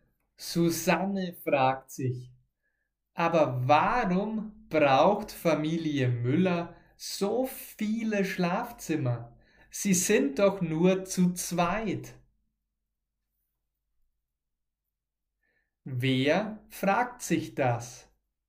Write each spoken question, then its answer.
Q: Wer fragt sich das?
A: Susanne Susanne fragt sich das.